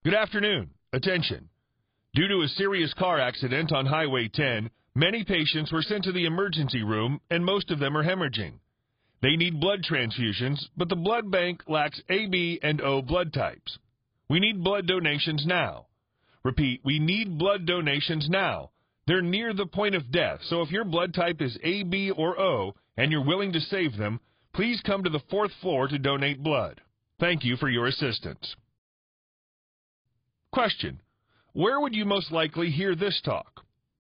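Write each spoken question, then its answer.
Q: where would you most likely hear this talk?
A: In a hospital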